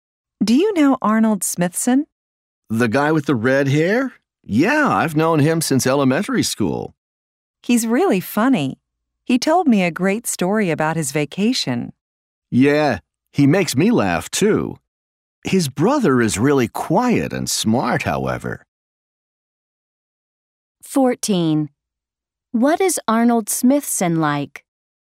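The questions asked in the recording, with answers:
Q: What is Arnold Smithson like?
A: He is funny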